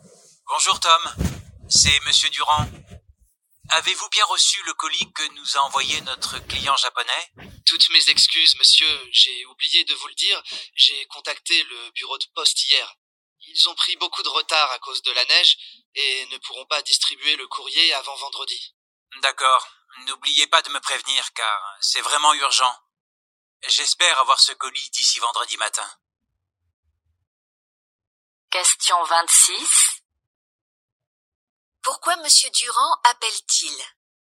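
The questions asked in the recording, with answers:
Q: Pourquoi Monsieur Durand appelle-t-il ?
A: Pour savoir si le colis du client japonais est arrivé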